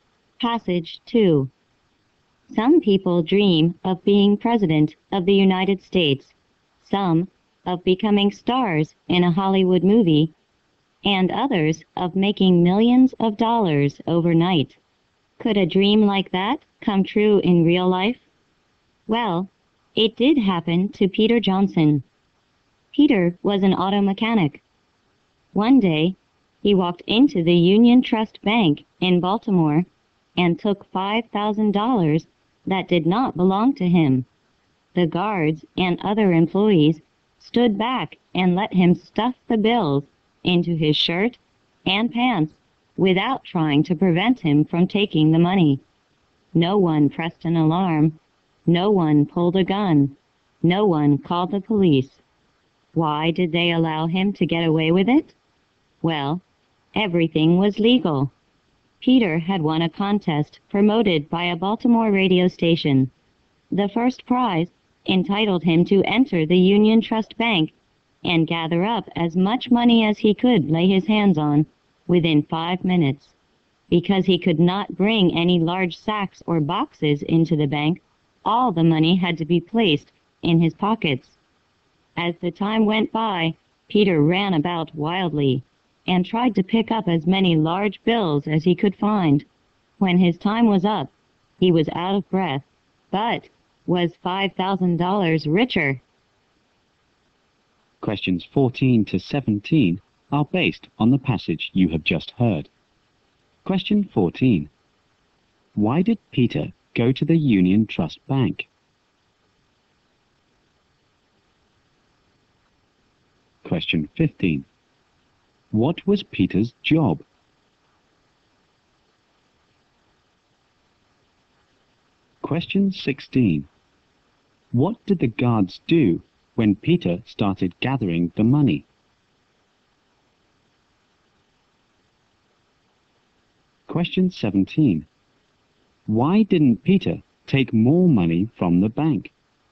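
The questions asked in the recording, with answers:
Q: Why did Peter go to the Union Trust Bank?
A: He had won a radio contest letting him collect money there

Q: What was Peter's job?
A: Auto mechanic

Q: What did the guards do when Peter started gathering the money?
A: They stood back and didn't stop him

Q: Why didn't Peter take more money from the bank?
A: He could only use his pockets and had just 5 minutes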